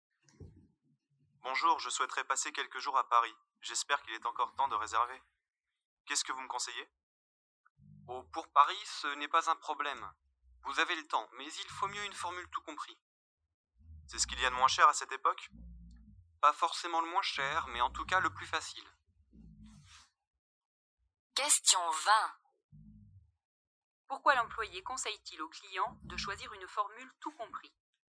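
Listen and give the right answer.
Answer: Parce que c'est le plus facile (pas forcément le moins cher).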